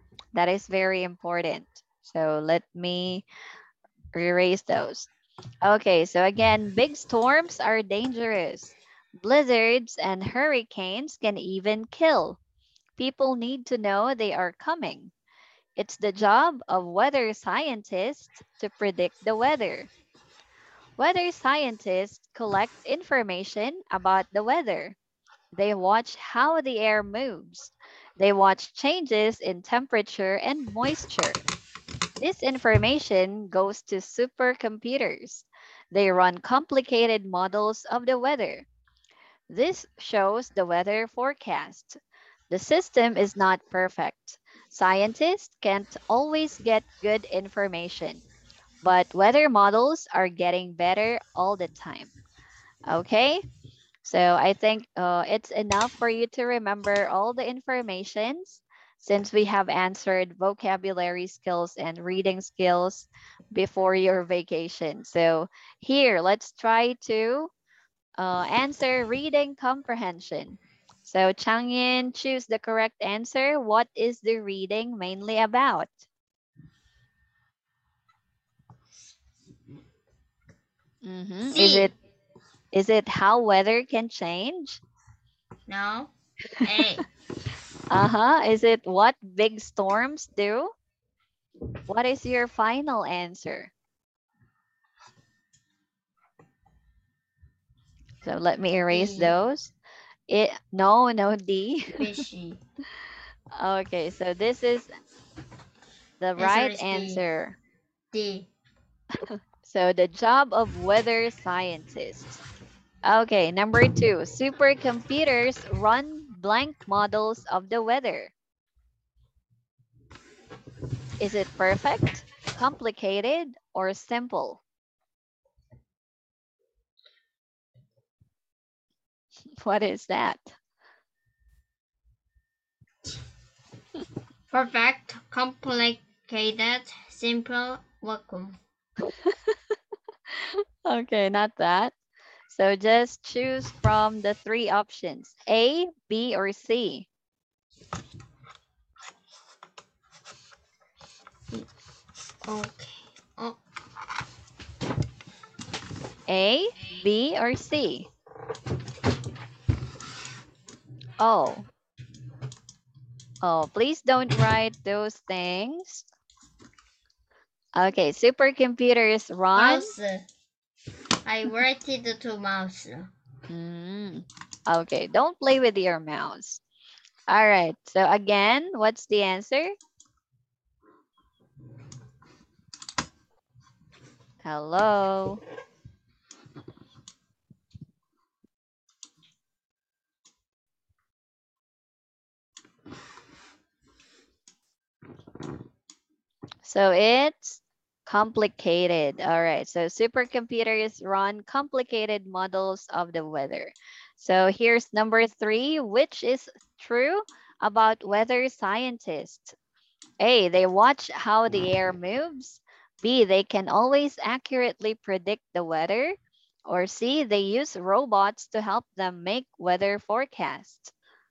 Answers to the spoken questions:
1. So it's complicated.
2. So it's A. They watch how the air moves.